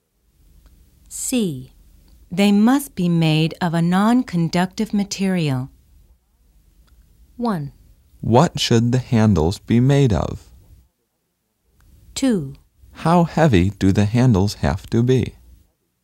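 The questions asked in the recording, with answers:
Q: They must be made of a non-conductive material.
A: 1: What should the handles be made of?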